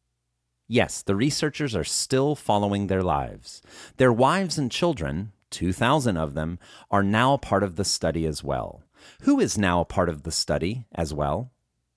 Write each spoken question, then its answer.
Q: Who is now a part of the study as well?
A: Their wives and children are now part of the study as well.